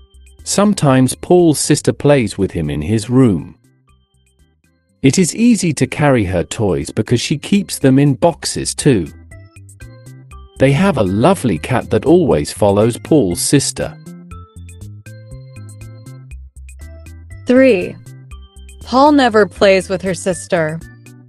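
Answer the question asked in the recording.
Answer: False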